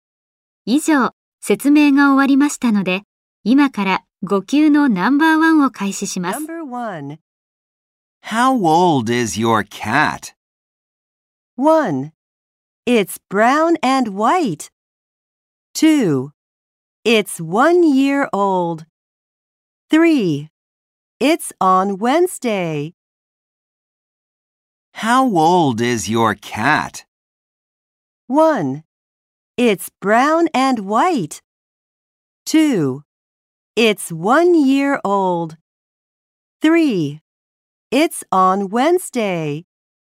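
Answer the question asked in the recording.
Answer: 2: It's 1 year old.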